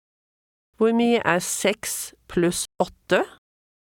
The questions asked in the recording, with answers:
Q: Hvor mye 6 pluss 8?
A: 14.